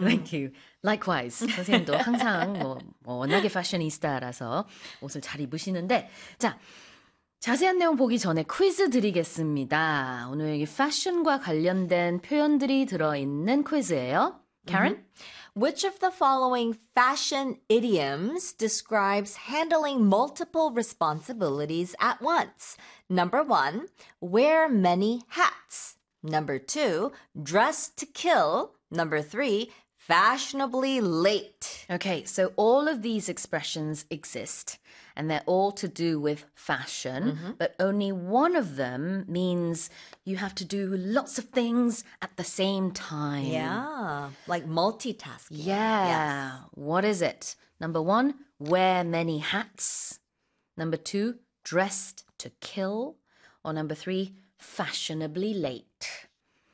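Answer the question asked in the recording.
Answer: 1: wear many hats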